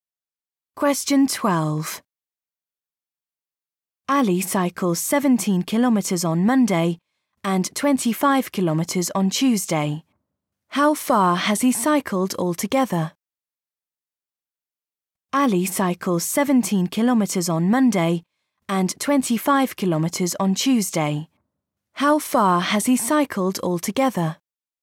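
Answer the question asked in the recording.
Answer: 42 kilometres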